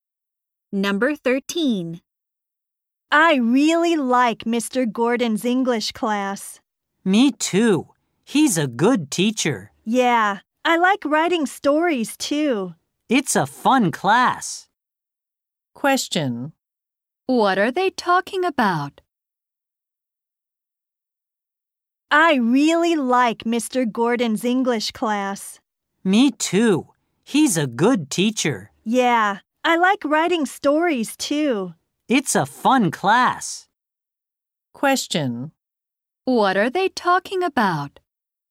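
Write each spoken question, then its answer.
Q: What are they talking about?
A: Mr. Gordon's English class.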